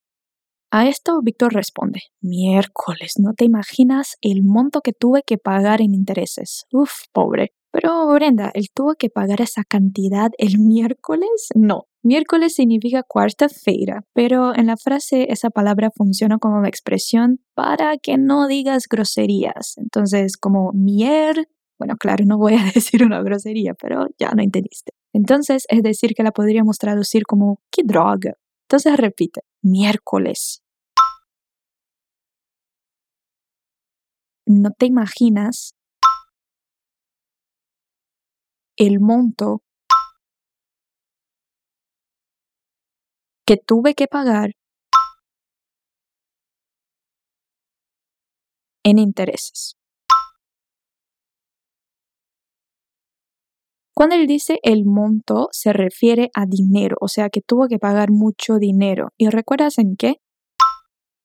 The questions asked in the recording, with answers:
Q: ¿Y recuerdas en qué?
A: En intereses.